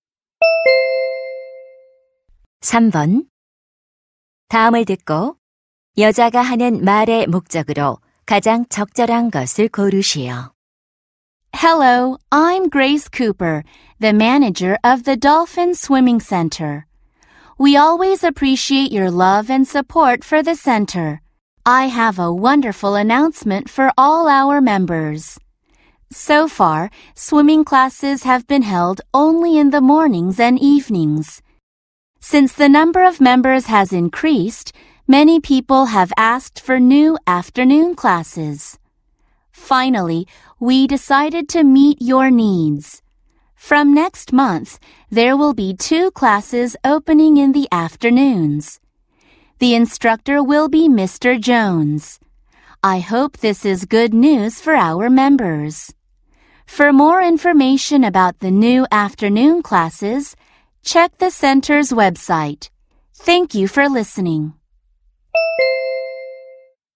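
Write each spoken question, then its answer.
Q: 다음을 듣고 여자가 하는 말의 목적으로 가장 적절한 것을 고르시오.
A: 오후 수영 강좌 신설을 안내하려고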